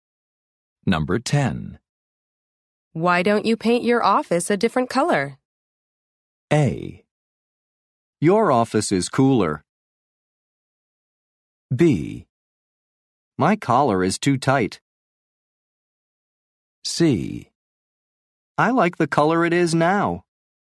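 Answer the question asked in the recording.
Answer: C: I like the color it is now.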